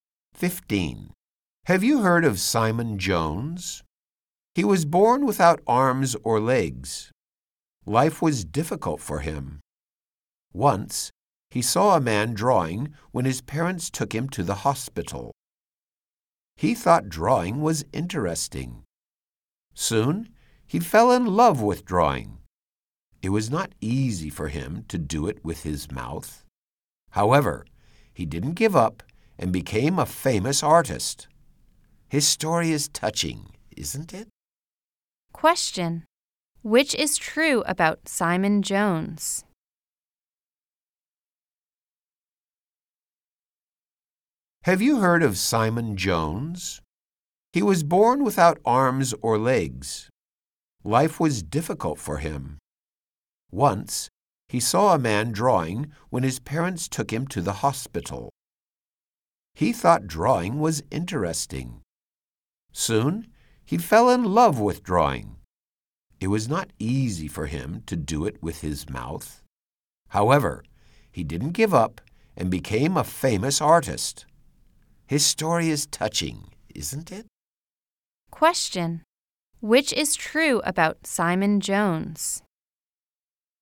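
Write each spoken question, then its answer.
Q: Question. Which is true about Simon Jones?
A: He was born without arms or legs and became a famous artist who draws with his mouth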